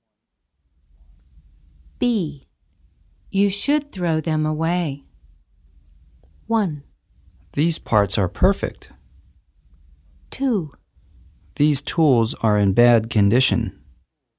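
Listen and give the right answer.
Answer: 2: These tools are in bad condition.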